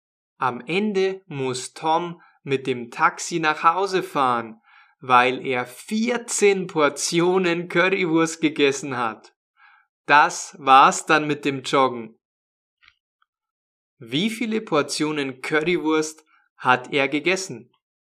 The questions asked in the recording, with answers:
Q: Wie viele Portionen Currywurst hat er gegessen?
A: Vierzehn.